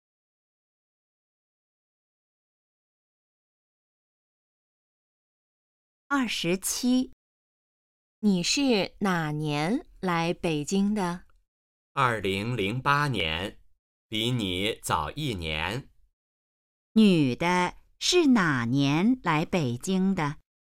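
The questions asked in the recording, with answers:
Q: 女的是哪年来北京的?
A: 2008年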